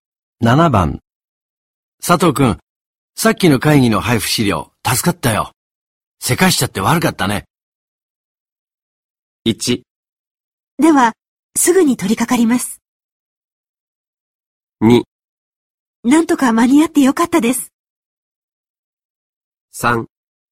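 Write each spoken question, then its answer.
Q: 佐藤くん、さっきの会議の配布資料、助かったよ。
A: 2: なんとか間に合ってよかったです。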